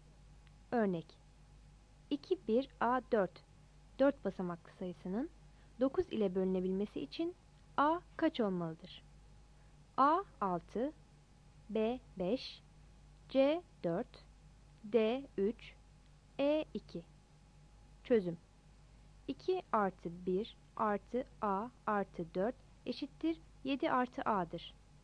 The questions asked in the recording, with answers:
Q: Örnek 2, 1, A, 4 4 basamaklı sayısının 9 ile bölünebilmesi için A kaç olmalıdır?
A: Yanıt E'dir.